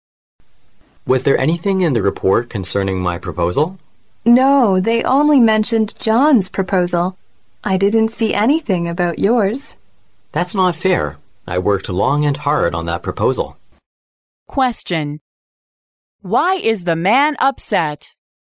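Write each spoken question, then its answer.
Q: Question. Why is the man upset?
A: The report mentioned only John's proposal, not his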